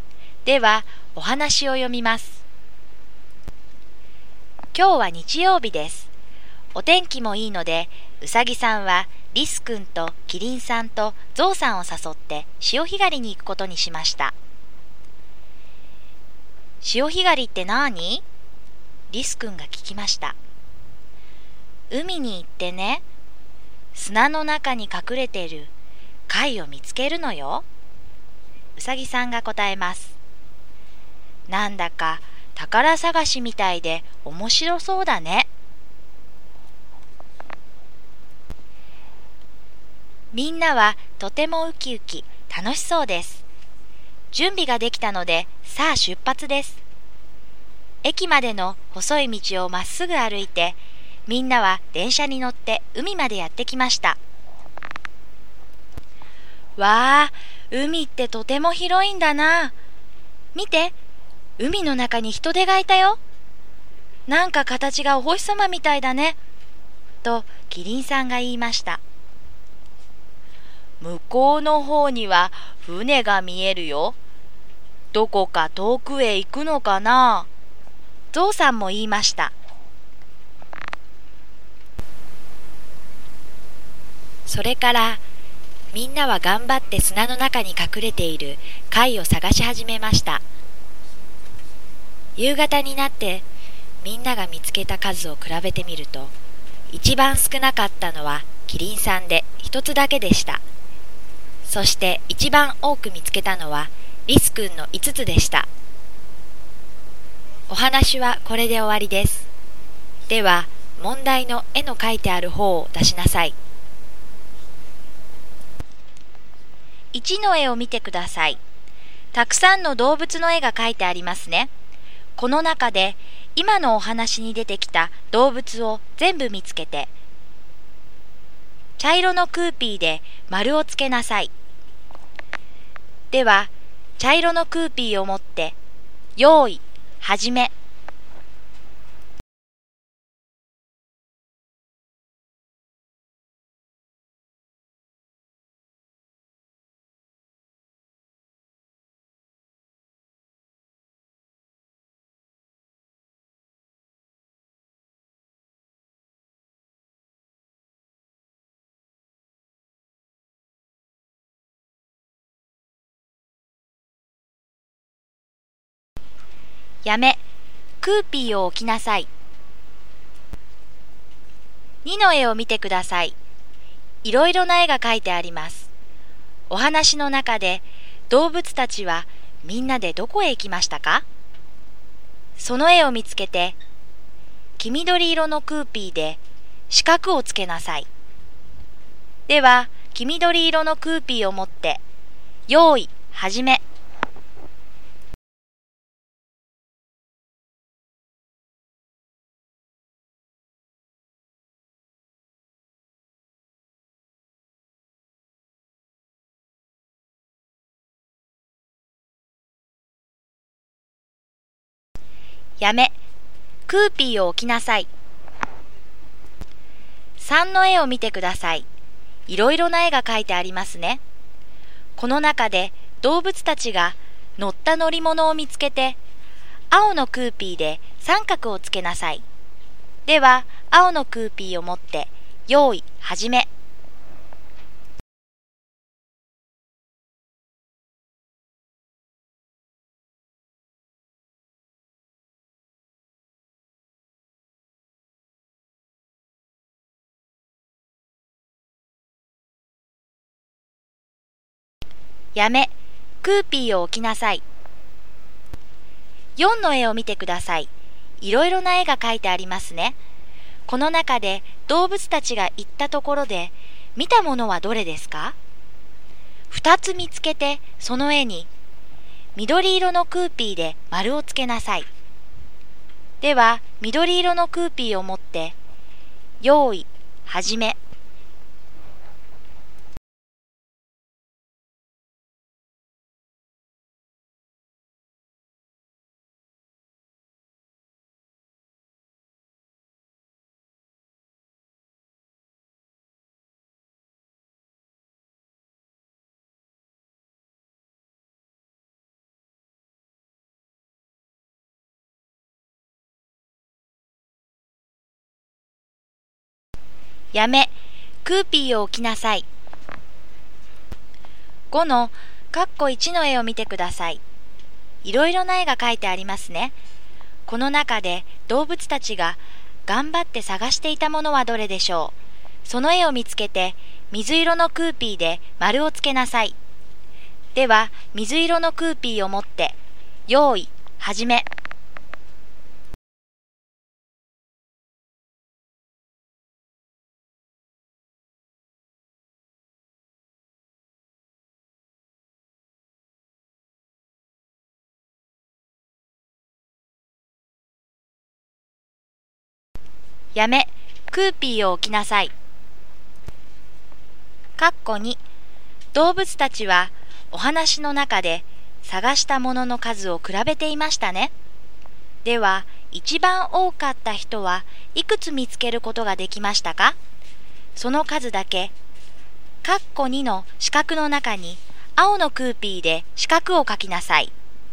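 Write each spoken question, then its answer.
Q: この中で今のお話に出てきた動物を全部見つけて、茶色のクーピーで丸をつけなさい。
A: うさぎ、リス、キリン、ゾウ

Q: この中で動物たちが乗った乗り物を見つけて、青のクーピーで三角をつけなさい。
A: 電車

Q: この中で動物たちが行ったところで、見たものはどれですか?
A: ヒトデと船

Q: では、一番多かった人はいくつ見つけることができましたか?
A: 5つ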